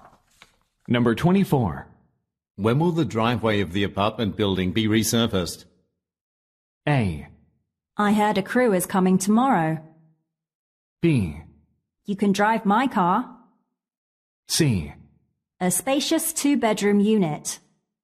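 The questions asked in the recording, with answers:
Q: When will the driveway of the apartment building be resurfaced?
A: A: I heard a crew is coming tomorrow.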